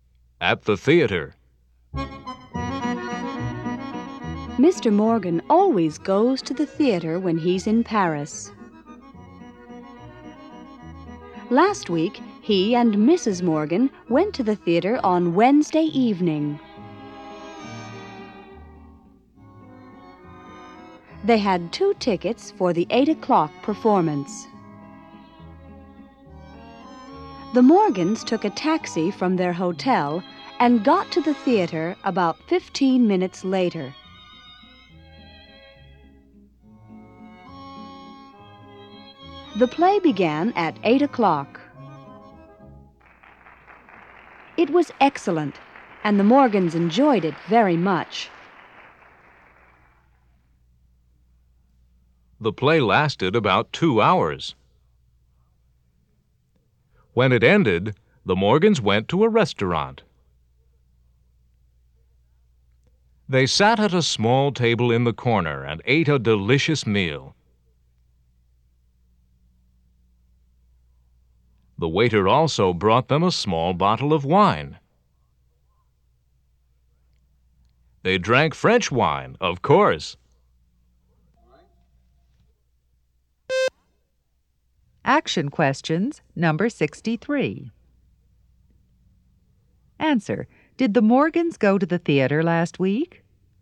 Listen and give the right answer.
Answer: Yes, they did.